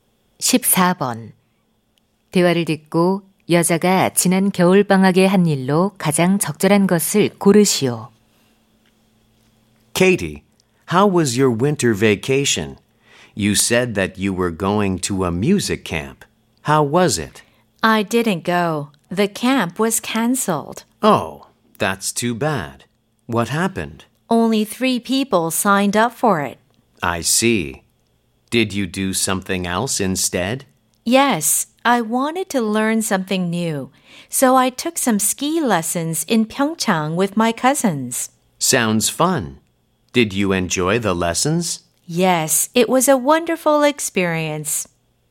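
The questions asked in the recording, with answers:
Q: 대화를 듣고 여자가 지난 겨울방학에 한 일로 가장 적절한 것을 고르시오.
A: 평창에서 스키 강습 받기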